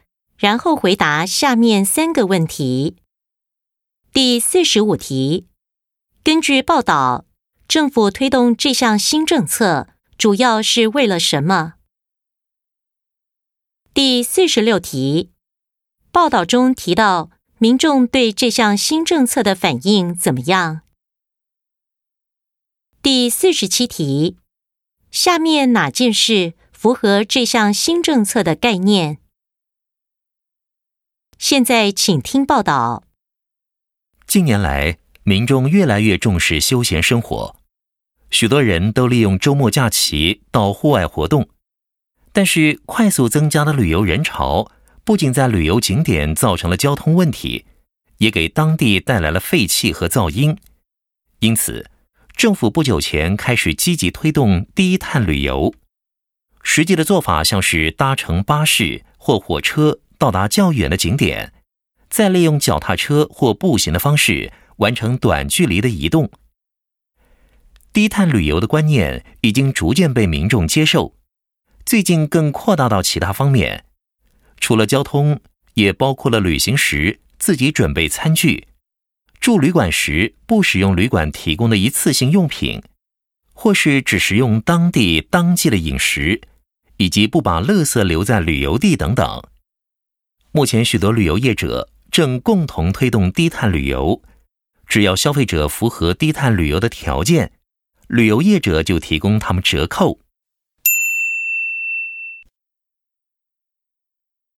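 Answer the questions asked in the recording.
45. 减少旅游人潮带来的交通问题、废气和噪音
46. 已经逐渐接受低碳旅游的观念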